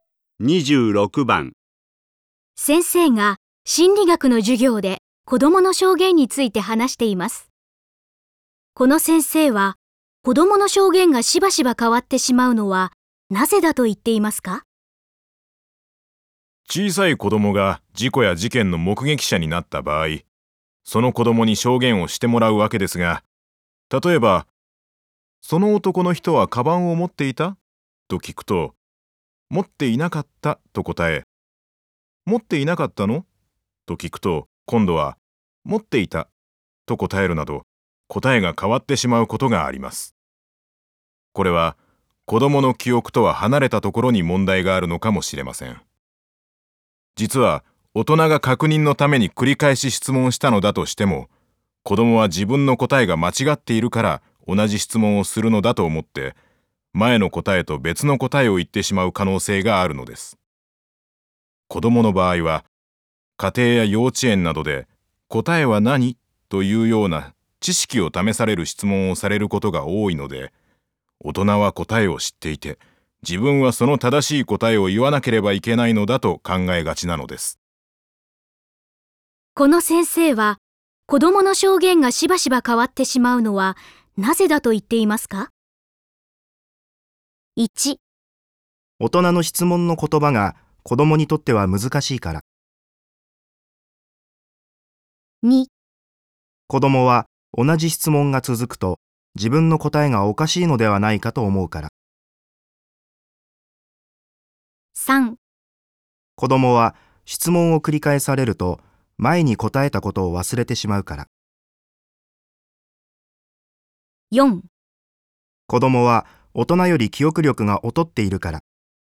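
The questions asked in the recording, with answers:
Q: この先生は、子供の証言がしばしば変わってしまうのはなぜだと言っていますか?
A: 2: 子供は同じ質問が続くと自分の答えがおかしいのではないかと思うから。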